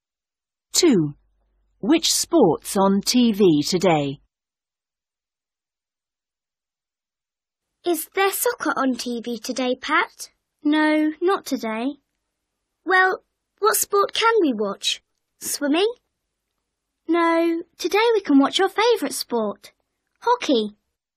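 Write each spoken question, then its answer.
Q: Which sport's on TV today?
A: hockey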